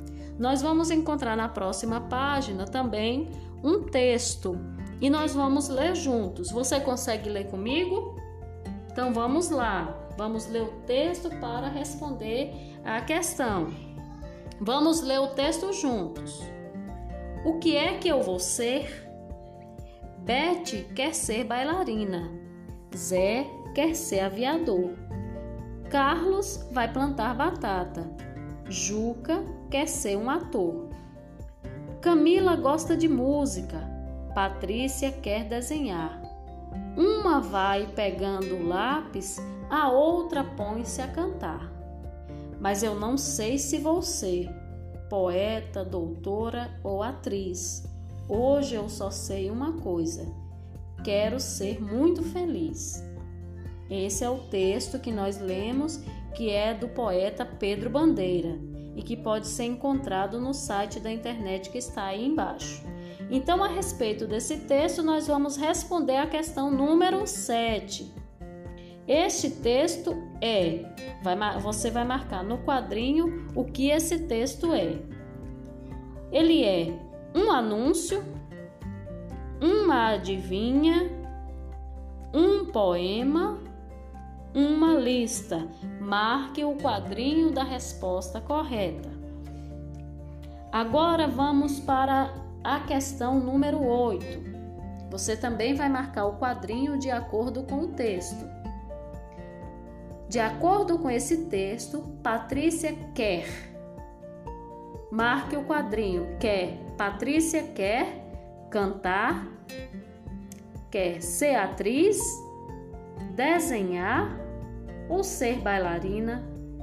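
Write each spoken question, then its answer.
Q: Este texto é, vai, você vai marcar no quadrinho o que esse texto é.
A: C: um poema

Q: Patrícia quer cantar, quer ser atriz, desenhar ou ser bailarina?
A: C: desenhar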